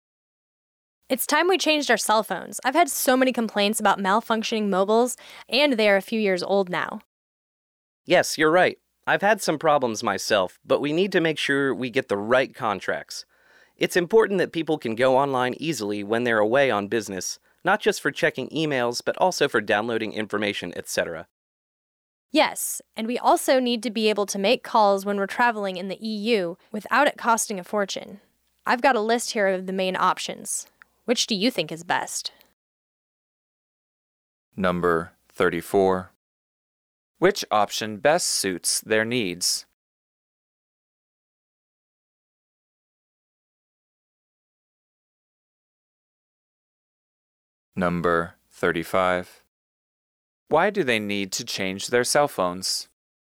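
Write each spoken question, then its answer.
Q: Why do they need to change their cell phones?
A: They are a few years old and people have complained that they malfunction.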